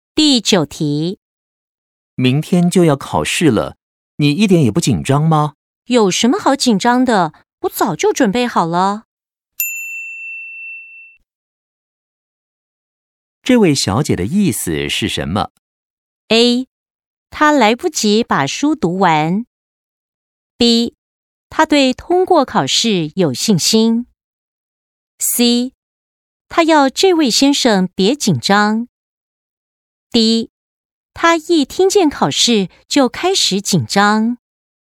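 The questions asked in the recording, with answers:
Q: 这位小姐的意思是什么?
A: B: 她对通过考试有信心。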